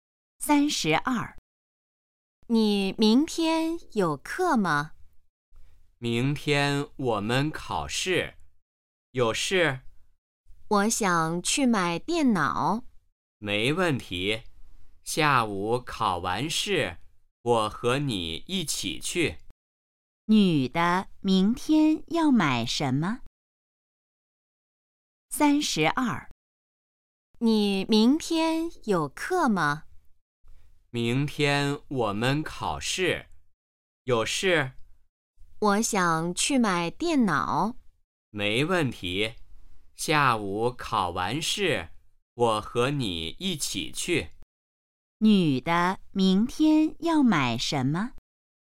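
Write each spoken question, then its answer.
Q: 女的明天要买什么?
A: 电脑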